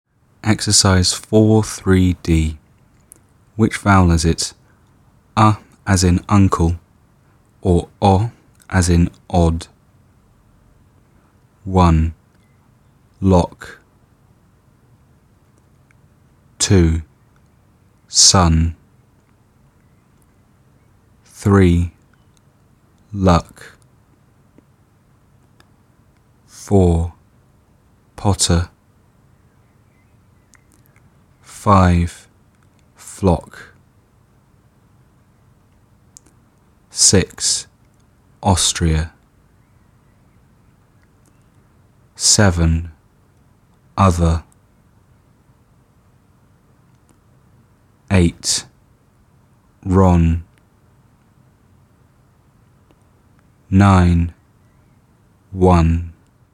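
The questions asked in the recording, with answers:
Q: Lock.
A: O, as in odd

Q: Luck.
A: A, as in uncle

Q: Potter.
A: O, as in odd

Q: Flock.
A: O, as in odd

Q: Other.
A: A, as in uncle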